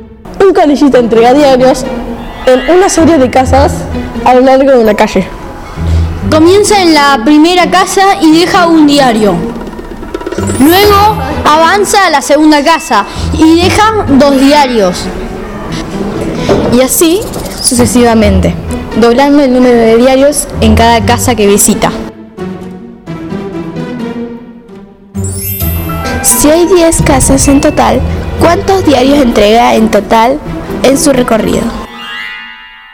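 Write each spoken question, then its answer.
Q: Si hay 10 casas en total, ¿cuántos diarios entrega en total en su recorrido?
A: 1023 diarios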